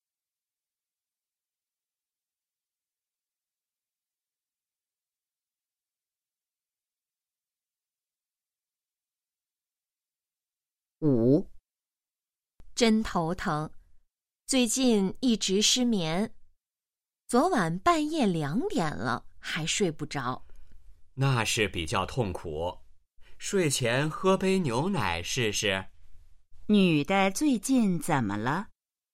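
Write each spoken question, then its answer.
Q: 女的最近怎么了?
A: 失眠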